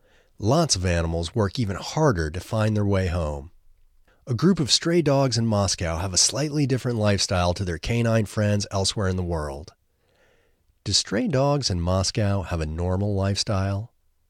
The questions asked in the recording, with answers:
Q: Do stray dogs in Moscow have a normal lifestyle?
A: No, they don't have a normal lifestyle.